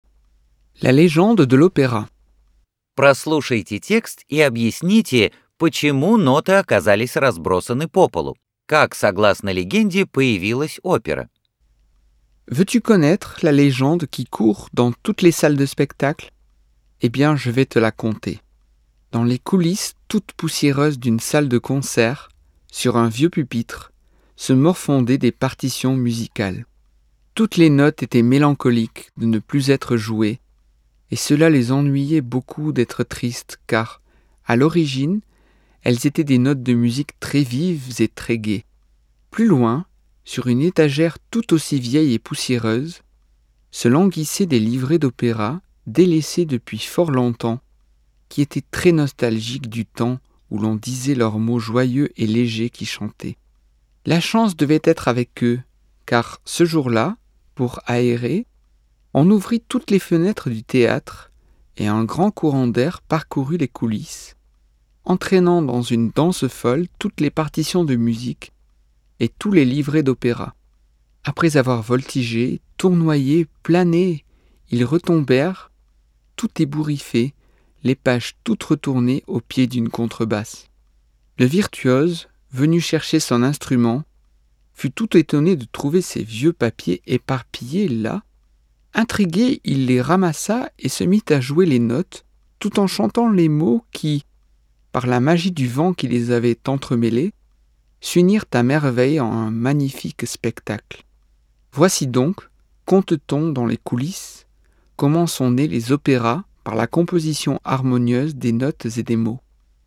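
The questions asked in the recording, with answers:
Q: Прослушайте текст и объясните, почему ноты оказались разбросаны по полу.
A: Когда открыли окна для проветривания, сквозняк поднял и разбросал ноты и либретто, и они упали у контрабаса

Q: Как, согласно легенде, появилась опера?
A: Музыкант собрал перемешанные ветром листы, стал играть ноты и петь слова, и они чудесно соединились в оперу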